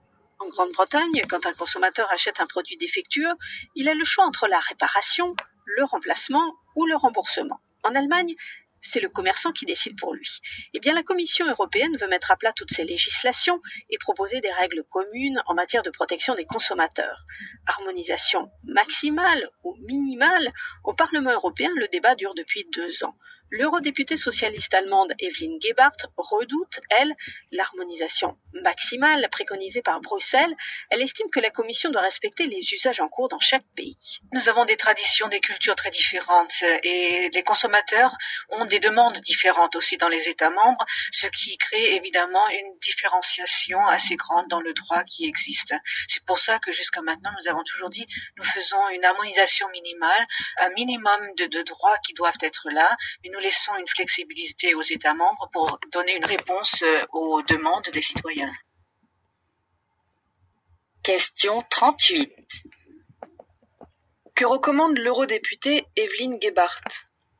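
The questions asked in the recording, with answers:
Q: Que recommande l'eurodéputée Evelyn Gebhardt ?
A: Une harmonisation minimale qui respecte les usages de chaque pays et laisse de la flexibilité aux États membres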